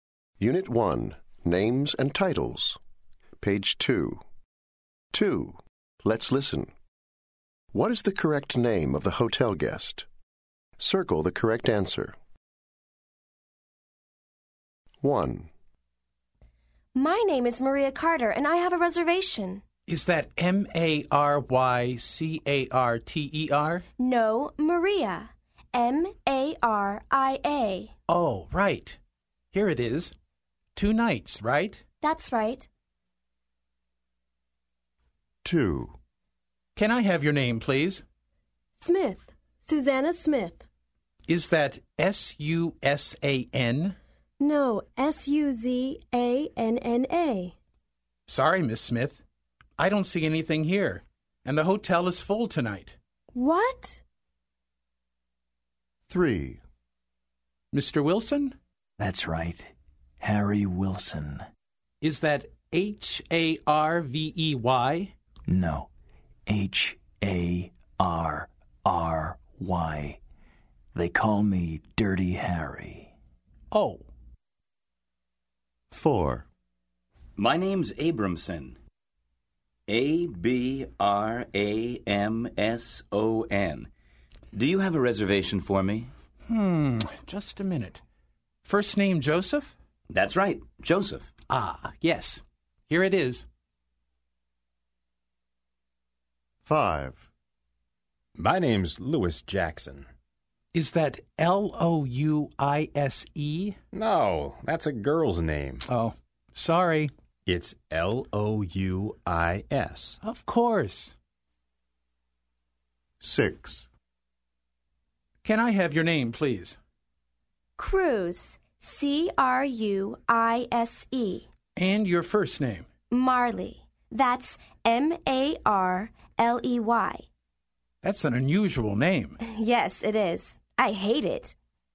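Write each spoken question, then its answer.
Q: What is the correct name of the hotel guest?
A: Maria Carter

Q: What is the correct name of the hotel guest?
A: Suzanna Smith

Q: What is the correct name of the hotel guest?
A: Harry Wilson

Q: What is the correct name of the hotel guest?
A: Joseph Abramson

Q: What is the correct name of the hotel guest?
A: Louis Jackson

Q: What is the correct name of the hotel guest?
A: Marley Cruise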